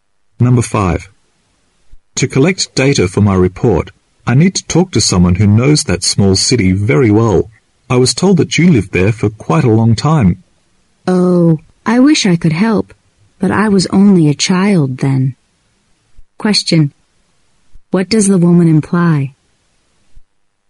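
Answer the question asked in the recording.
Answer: She can't give much help because she was only a child when she lived there.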